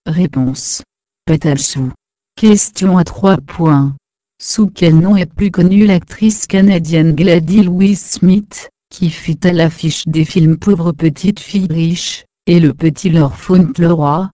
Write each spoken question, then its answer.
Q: Sous quel nom est plus connue l'actrice canadienne Gladys Louis-Smith, qui fut à l'affiche des films Pauvre Petite Fille Riche, et Le Petit Lord Fauntleroy?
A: Mary Pickford